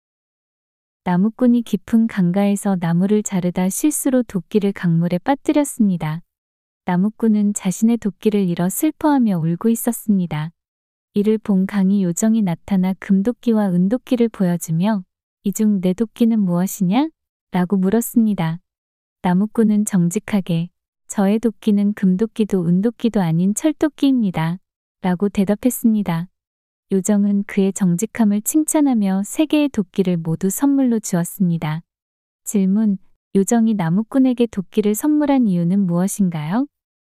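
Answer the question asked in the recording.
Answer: 나무꾼이 정직했기 때문에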